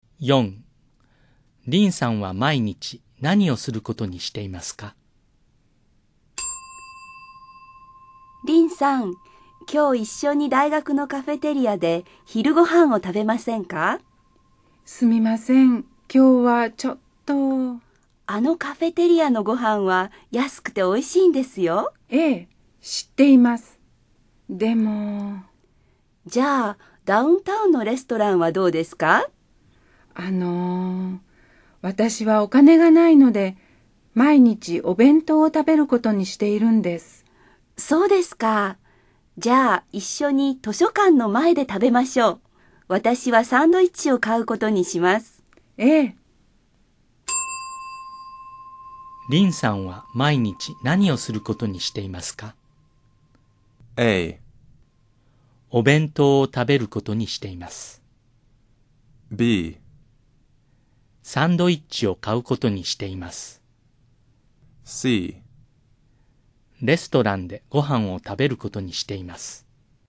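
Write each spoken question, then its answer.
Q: リンさんは毎日何をすることにしていますか?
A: A: お弁当を食べることにしています。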